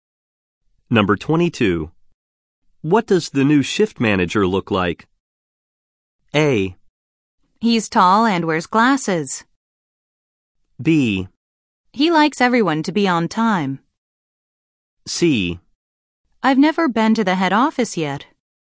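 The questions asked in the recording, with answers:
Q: What does the new shift manager look like?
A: A: He's tall and wears glasses.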